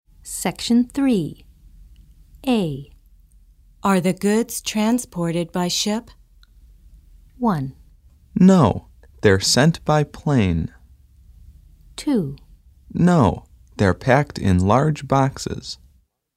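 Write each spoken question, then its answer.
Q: Are the goods transported by ship?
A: 1: No, they're sent by plane.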